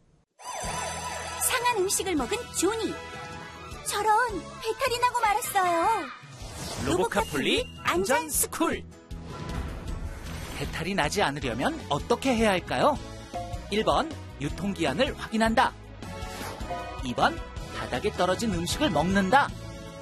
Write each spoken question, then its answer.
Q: 배탈이 나지 않으려면 어떻게 해야 할까요?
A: 정답은 1번. 음식을 먹기 전에는 유통기한을 꼭 확인해야 해요.